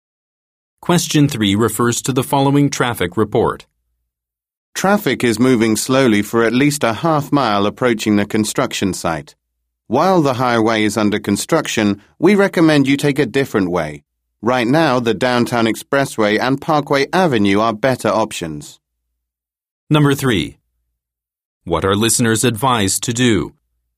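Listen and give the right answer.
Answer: Take a different route, such as the Downtown Expressway or Parkway Avenue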